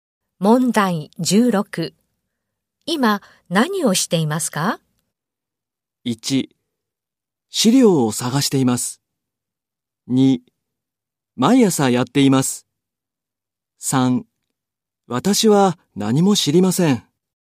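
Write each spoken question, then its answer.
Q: 今、何をしていますか?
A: 3: 資料を探しています。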